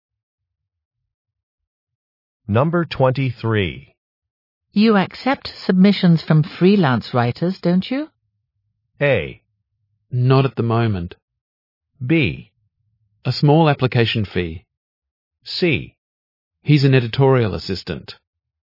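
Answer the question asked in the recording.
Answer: A: Not at the moment.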